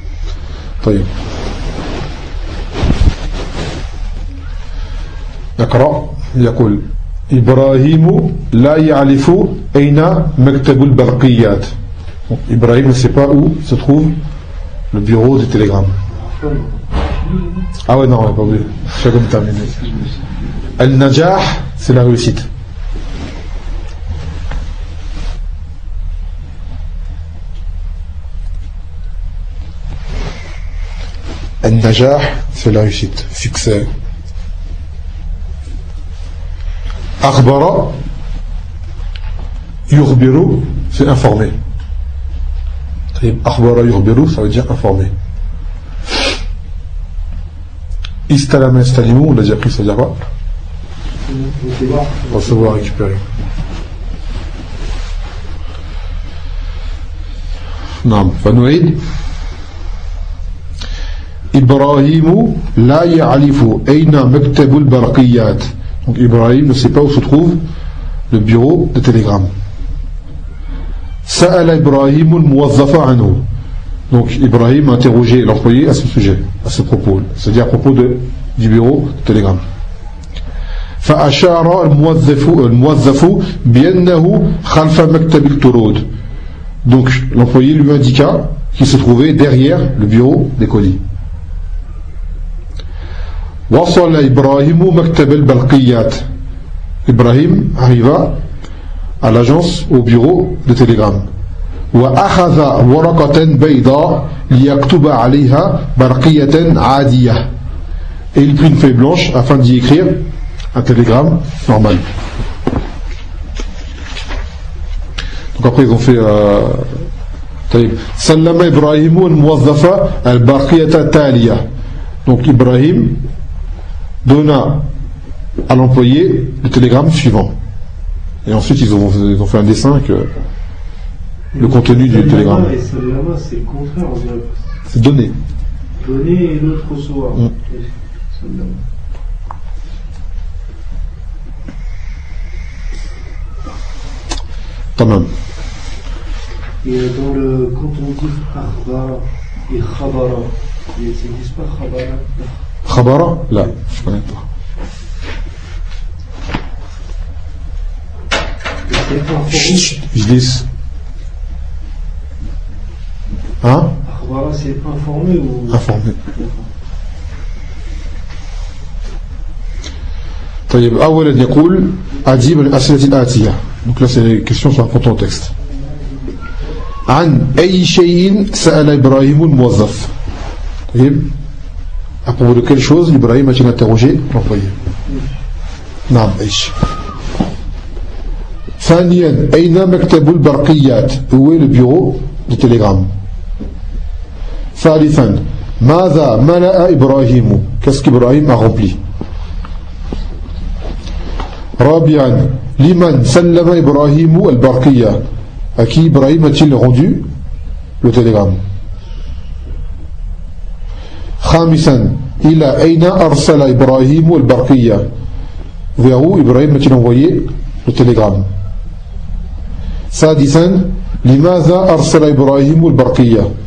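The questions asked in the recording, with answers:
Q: À propos de quelle chose Ibrahim a-t-il interrogé l'employé?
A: À propos de l'endroit où se trouve le bureau des télégrammes

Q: Aïna Maktabul Barqiyat, où est le bureau de télégramme?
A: Derrière le bureau des colis

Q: à qui Ibrahim a-t-il rendu le télégramme?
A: À l'employé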